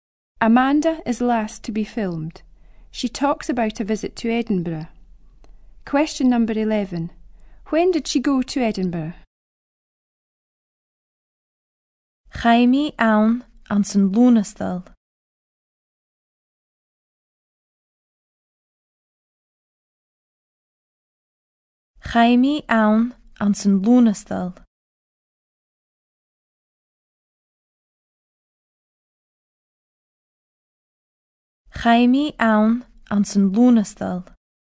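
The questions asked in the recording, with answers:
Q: When did she go to Edinburgh?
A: In August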